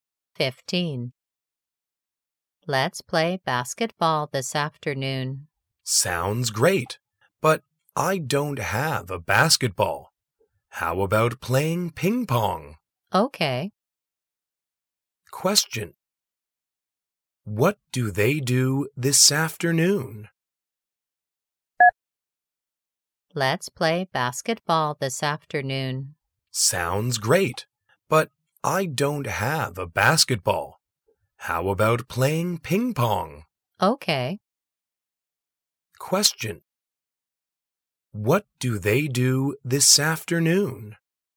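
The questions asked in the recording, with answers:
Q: What do they do this afternoon?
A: Play ping pong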